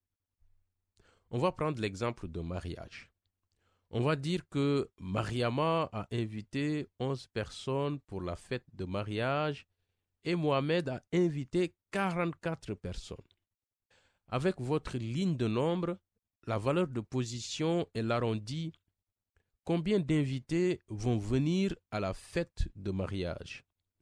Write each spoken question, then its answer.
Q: Avec votre ligne de nombre, la valeur de position et l'arrondi, combien d'invités vont venir à la fête de mariage?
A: Je pense 50.